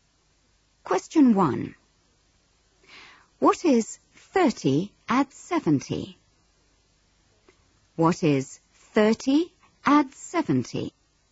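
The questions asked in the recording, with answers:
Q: What is 30 add 70?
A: 100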